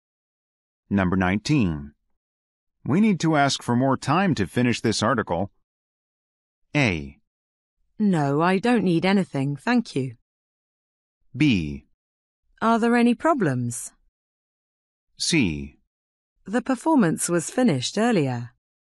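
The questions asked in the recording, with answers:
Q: We need to ask for more time to finish this article.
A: B: Are there any problems?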